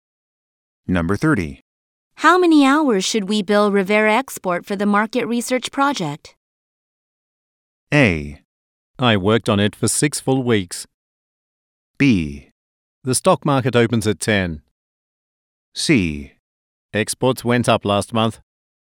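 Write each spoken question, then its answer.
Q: How many hours should we bill Rivera Export for the market research project?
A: A: I worked on it for 6 full weeks.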